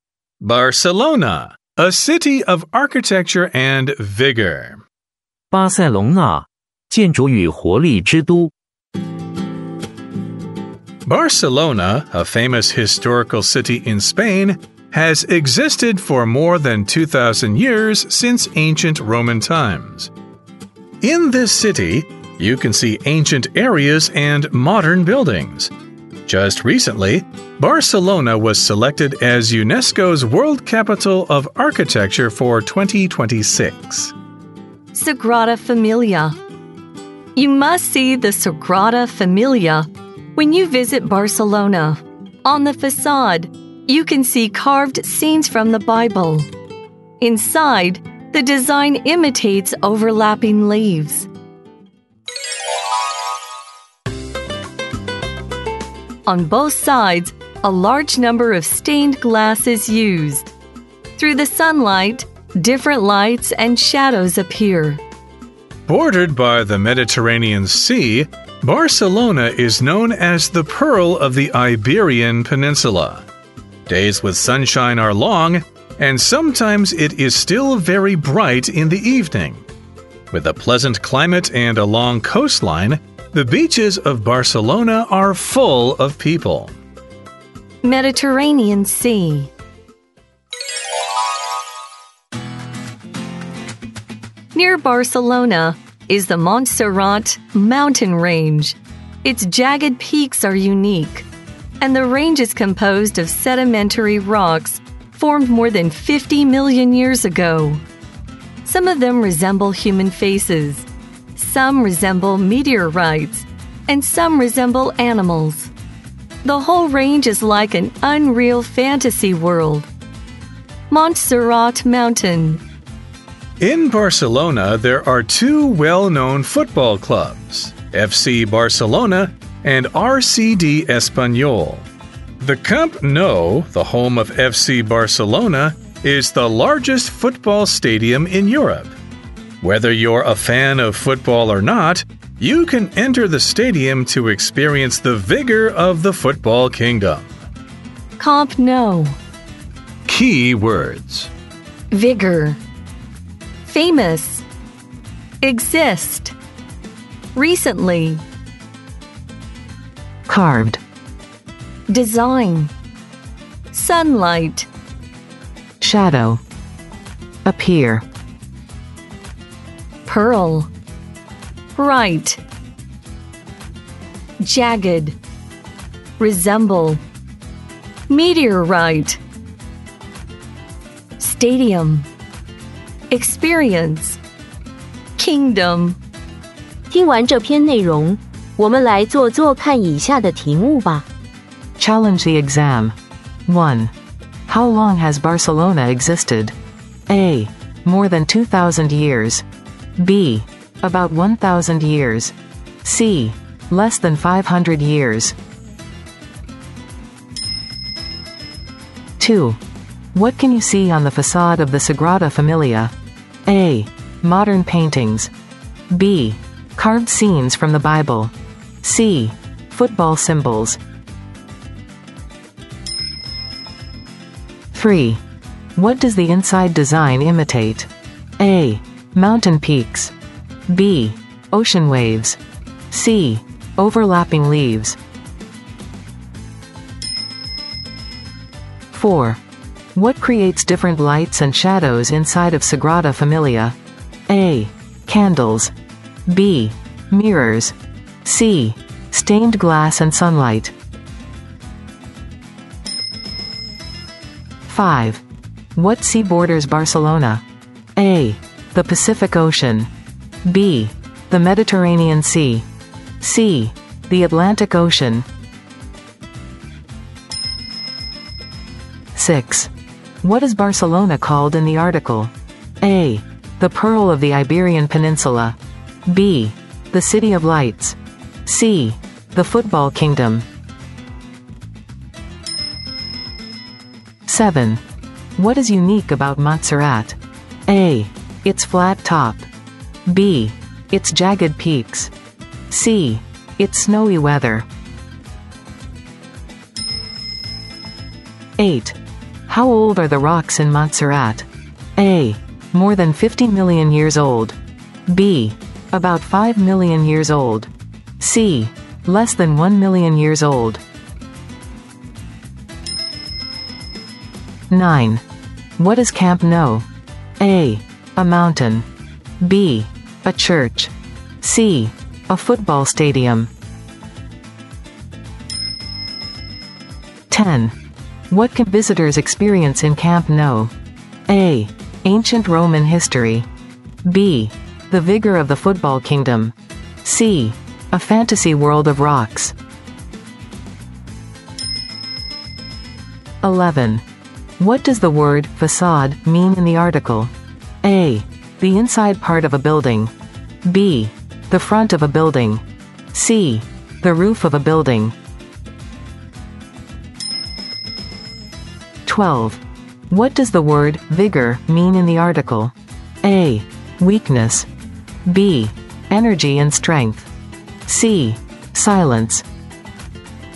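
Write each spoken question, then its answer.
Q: How long has Barcelona existed?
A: A: More than 2,000 years

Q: What can you see on the facade of the Sagrada Familia?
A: B: Carved scenes from the Bible.

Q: What does the inside design imitate?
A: C: Overlapping leaves.

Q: What creates different lights and shadows inside of Sagrada Familia?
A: C: Stained glass and sunlight.

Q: What sea borders Barcelona?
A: B: The Mediterranean Sea.

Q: What is Barcelona called in the article?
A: A: The Pearl of the Iberian Peninsula.

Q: What is unique about Montserrat?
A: B: Its jagged peaks.

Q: How old are the rocks in Montserrat?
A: A: More than 50 million years old.

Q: What is Camp Nou?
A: C: A football stadium.

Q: What can visitors experience in Camp Nou?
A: B: The vigor of the football kingdom.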